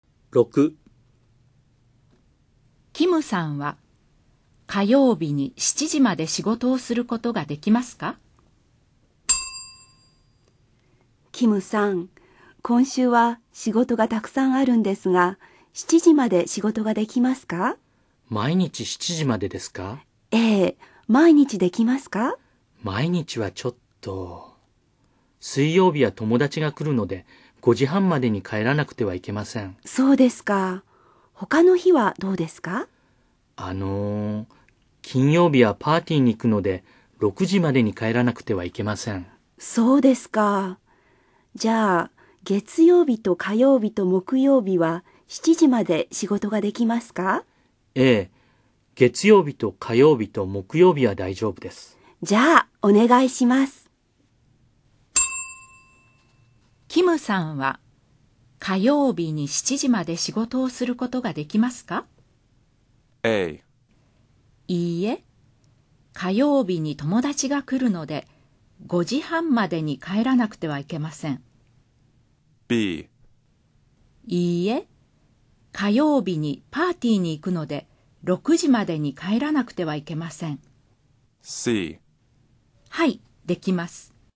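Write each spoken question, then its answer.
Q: キムさんは火曜日に7時まで仕事をすることができますか?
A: C: はい、できます。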